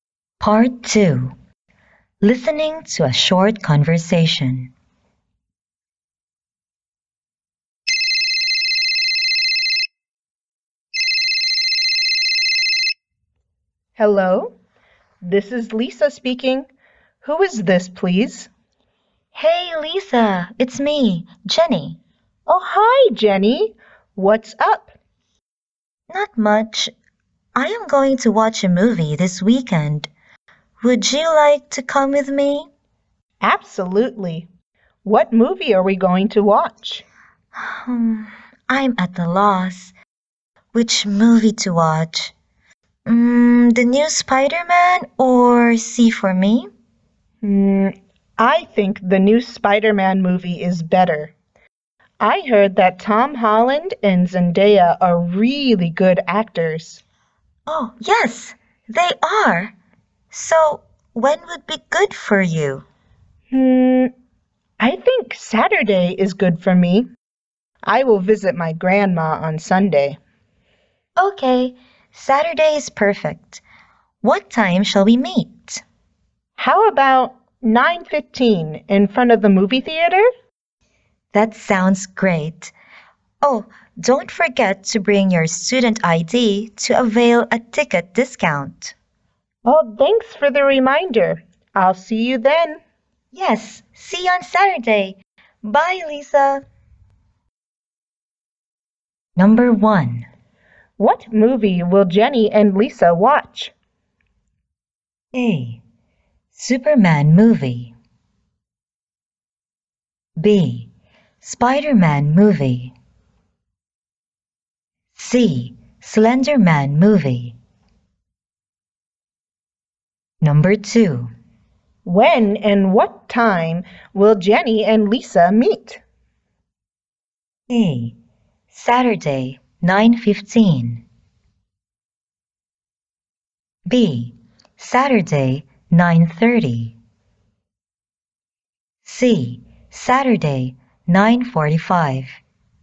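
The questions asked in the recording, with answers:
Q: What movie will Jenny and Lisa watch?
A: B: Spider-Man movie.

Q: When and what time will Jenny and Lisa meet?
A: A: Saturday, 9:15.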